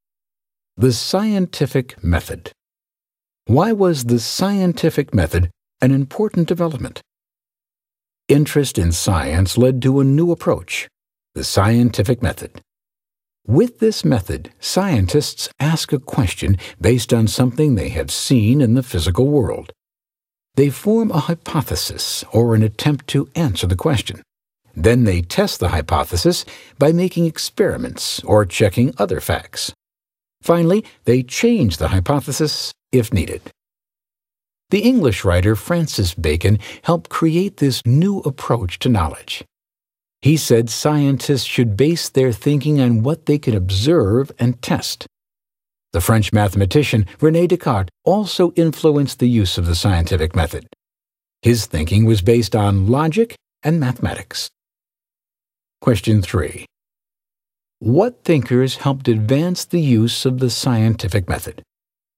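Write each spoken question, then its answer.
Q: What thinkers helped advance the use of the scientific method?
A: Francis Bacon and René Descartes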